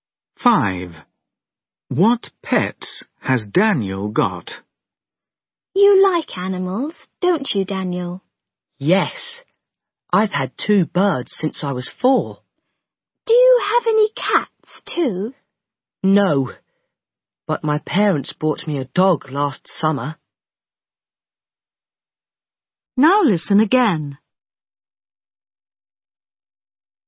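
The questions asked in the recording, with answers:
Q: What pets has Daniel got?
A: two birds and a dog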